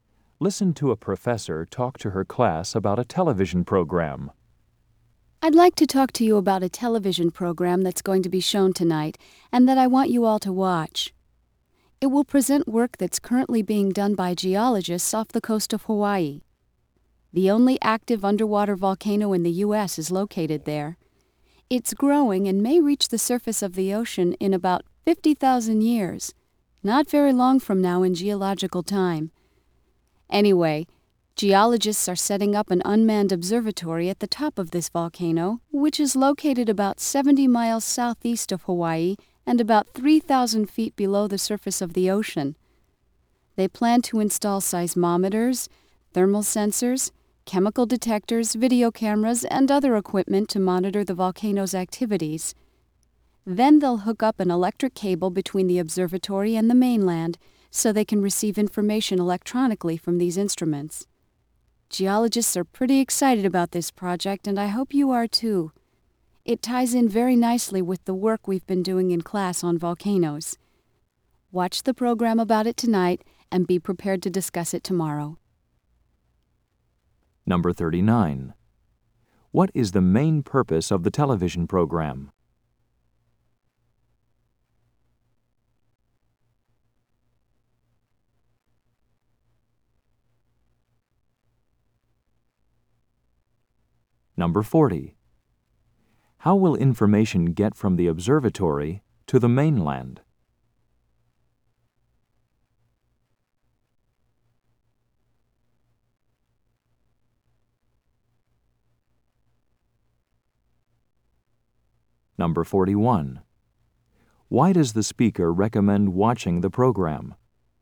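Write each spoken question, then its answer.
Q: What is the main purpose of the television program?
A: To show geologists' work setting up an observatory on an underwater volcano off Hawaii

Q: How will information get from the observatory to the mainland?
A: Electronically through an electric cable

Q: Why does the speaker recommend watching the program?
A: It ties in with the class work on volcanoes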